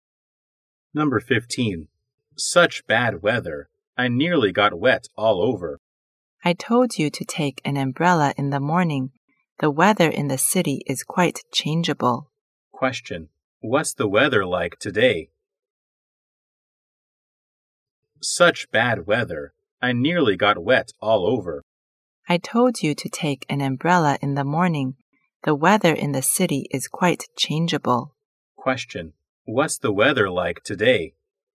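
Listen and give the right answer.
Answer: Rainy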